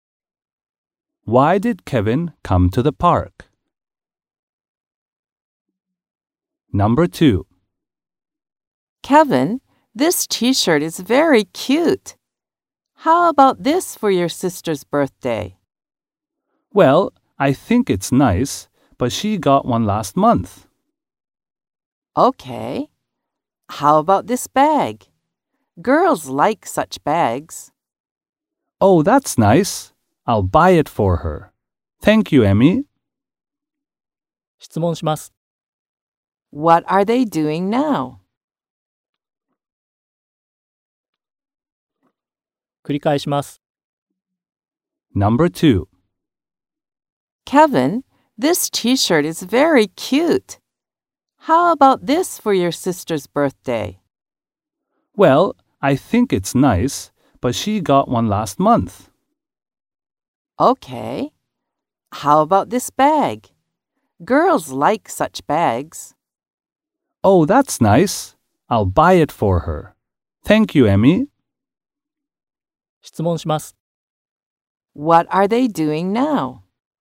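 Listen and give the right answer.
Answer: Shopping for a birthday present for Kevin's sister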